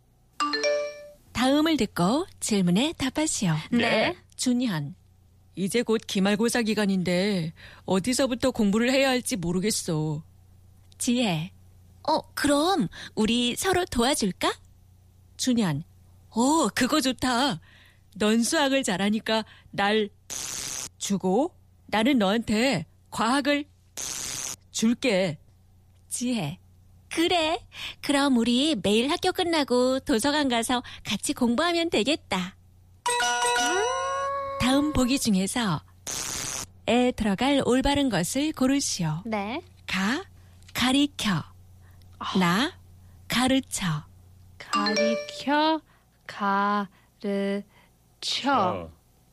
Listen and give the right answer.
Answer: The correct answer was 가르쳐.